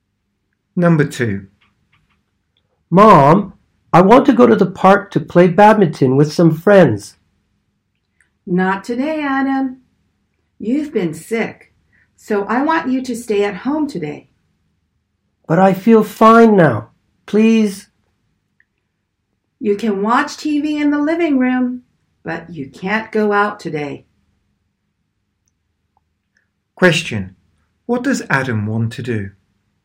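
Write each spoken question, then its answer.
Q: What does Adam want to do?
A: Go to the park to play badminton with friends.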